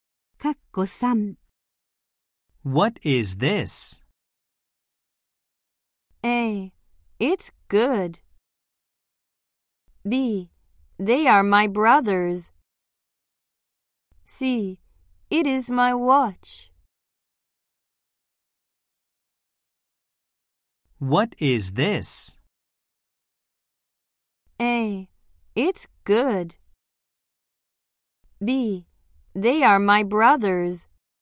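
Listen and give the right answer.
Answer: C: It is my watch.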